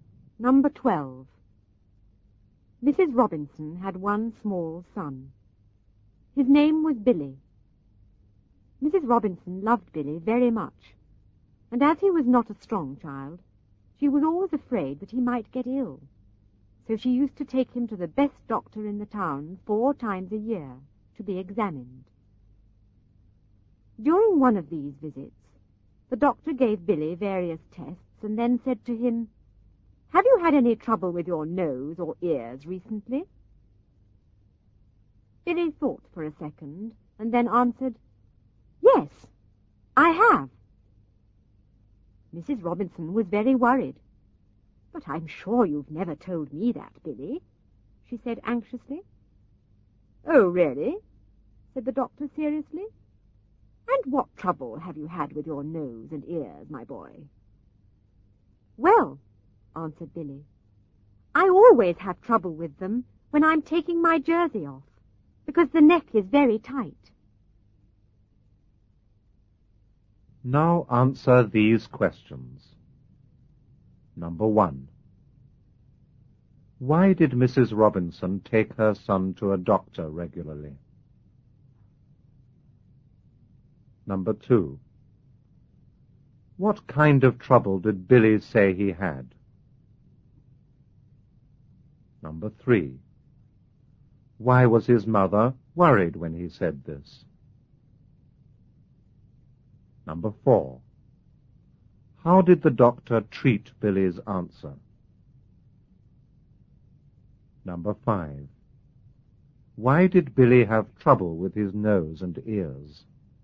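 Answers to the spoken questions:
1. Because he was not strong and she was afraid he might get ill
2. Trouble with his nose and ears
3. He had never told her about it
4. Seriously
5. The neck of his jersey was very tight when he took it off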